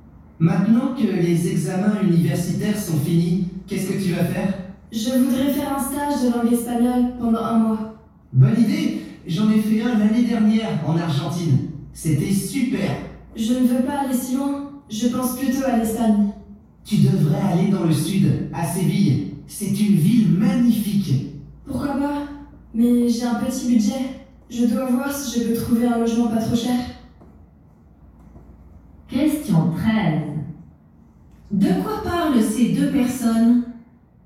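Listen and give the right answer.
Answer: D'un projet de stage de langue espagnole en Espagne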